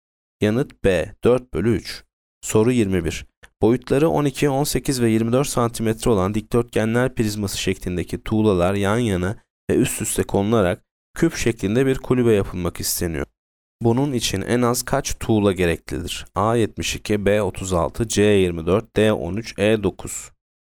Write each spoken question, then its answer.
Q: Bunun için en az kaç tuğla gereklidir?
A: Yanıt A 72.